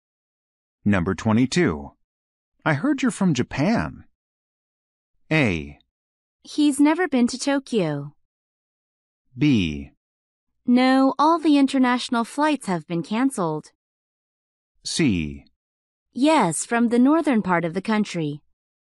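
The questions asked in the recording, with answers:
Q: I heard you're from Japan.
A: C: Yes, from the northern part of the country.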